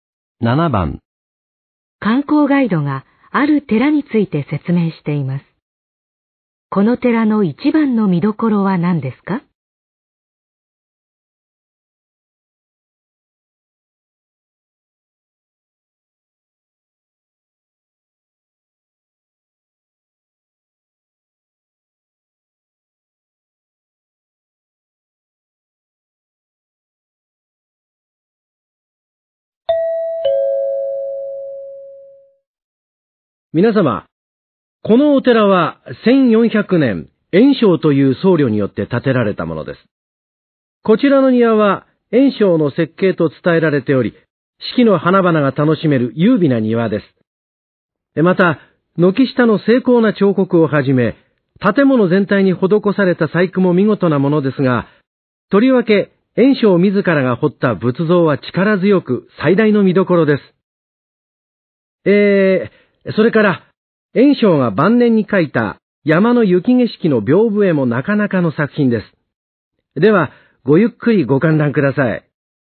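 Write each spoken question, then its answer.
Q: この寺の一番の見どころは何ですか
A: 炎章自らが彫った仏像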